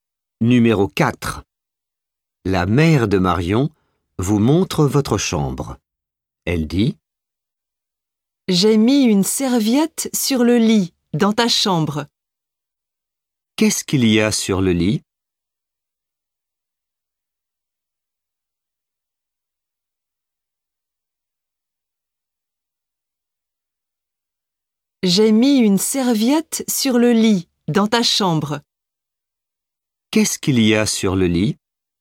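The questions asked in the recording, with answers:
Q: Qu'est-ce qu'il y a sur le lit ?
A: Une serviette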